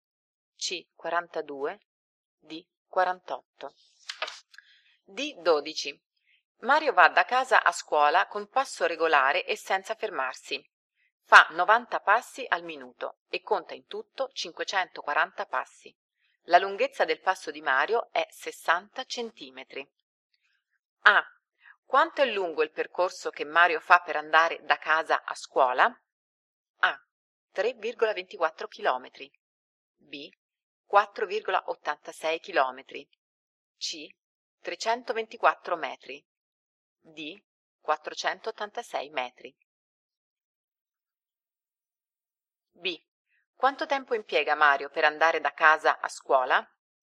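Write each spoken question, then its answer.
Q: Quanto è lungo il percorso che Mario fa per andare da casa a scuola?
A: C: 324 metri

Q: Quanto tempo impiega Mario per andare da casa a scuola?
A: 6 minuti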